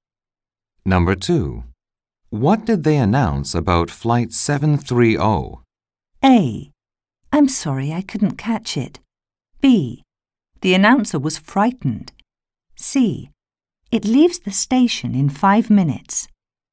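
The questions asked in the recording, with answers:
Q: What did they announce about Flight 730?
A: A: I'm sorry, I couldn't catch it.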